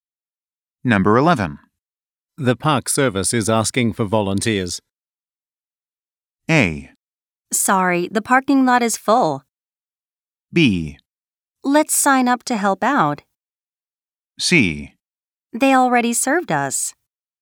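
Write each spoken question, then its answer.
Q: The Park Service is asking for volunteers.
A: B: Let's sign up to help out.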